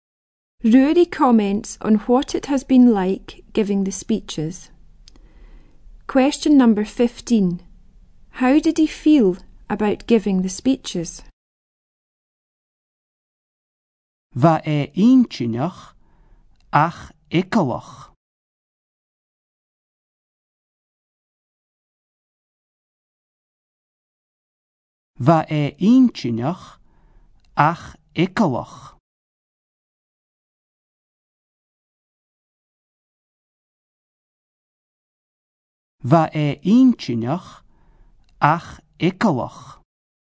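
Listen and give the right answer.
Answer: Interesting but scary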